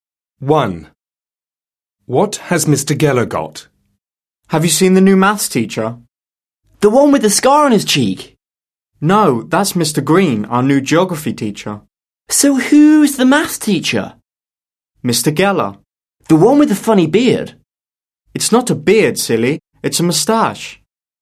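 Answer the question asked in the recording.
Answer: a moustache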